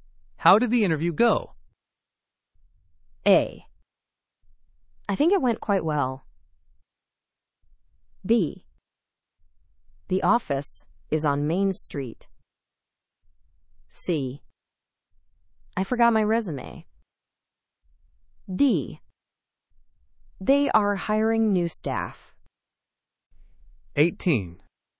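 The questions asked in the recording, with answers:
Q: How did the interview go?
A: A: I think it went quite well.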